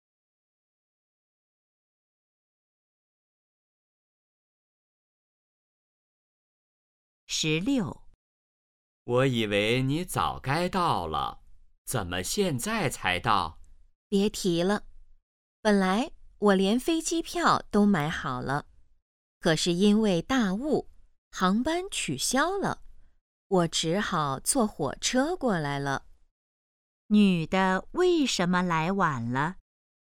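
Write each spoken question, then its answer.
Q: 女的为什么来晚了?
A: 因为大雾航班取消,只好坐火车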